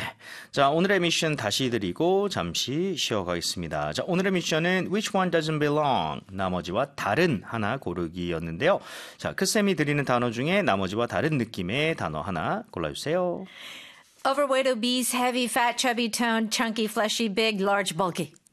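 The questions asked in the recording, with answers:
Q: Which one doesn't belong?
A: toned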